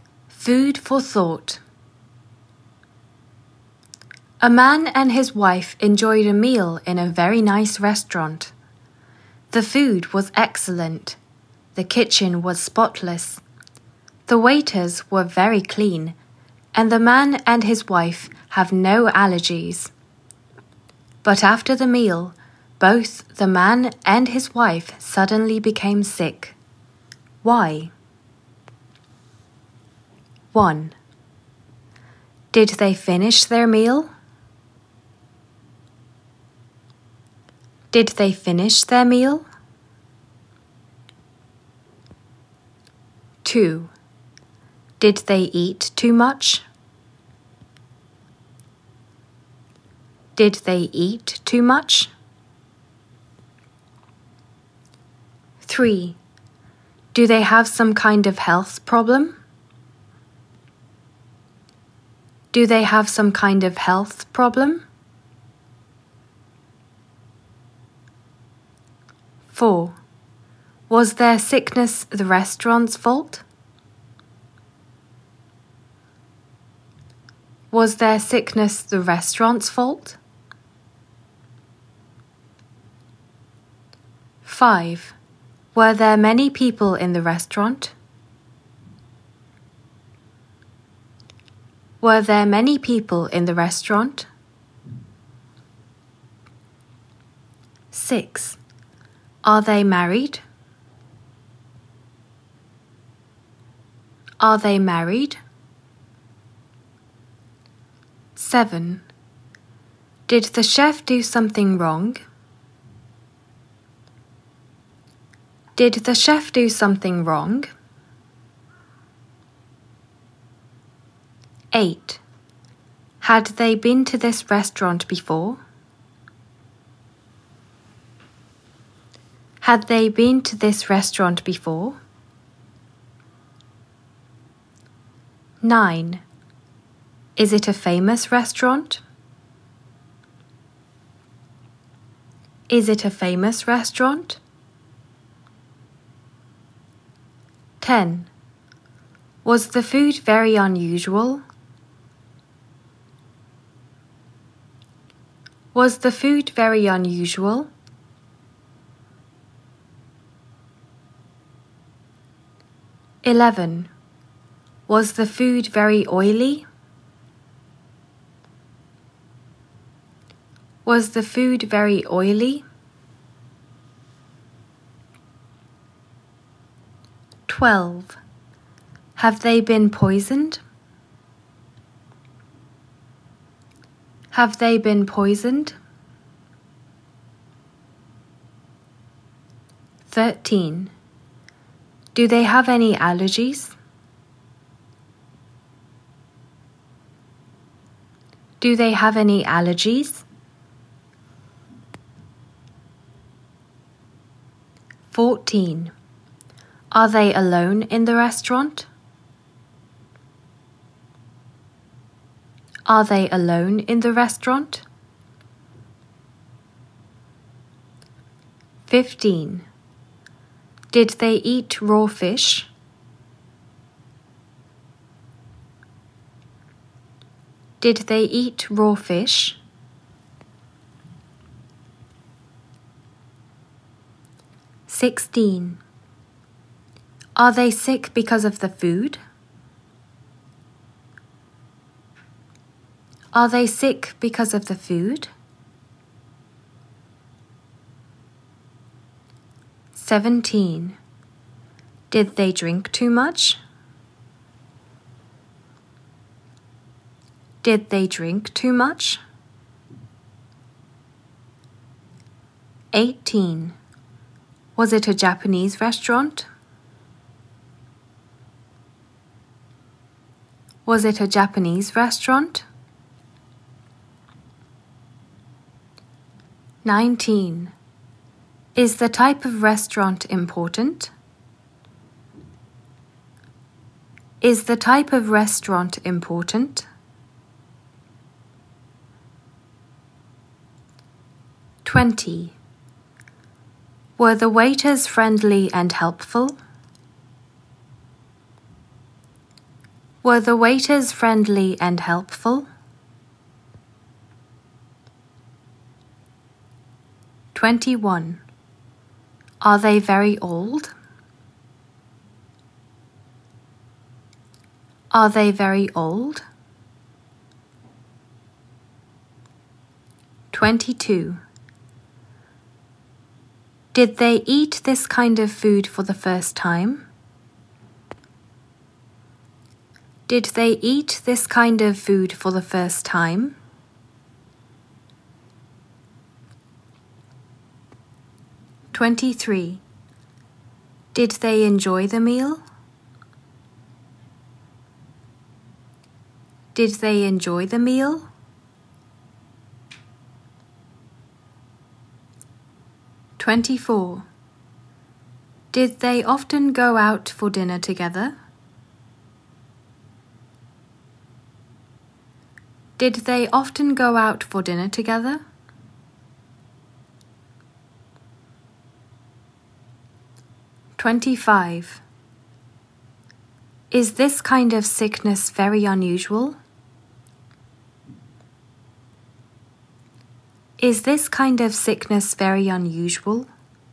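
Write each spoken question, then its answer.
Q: Are they married?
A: Yes

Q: Do they have any allergies?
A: No

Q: Did they enjoy the meal?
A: Yes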